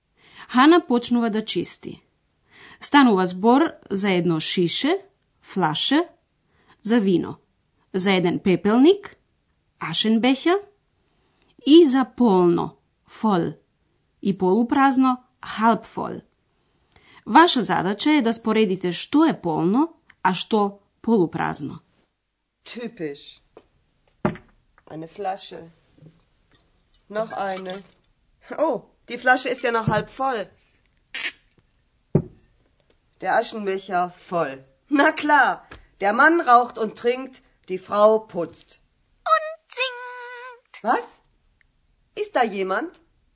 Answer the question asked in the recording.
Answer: Пепелникот е полн, а шишето со вино полупразно.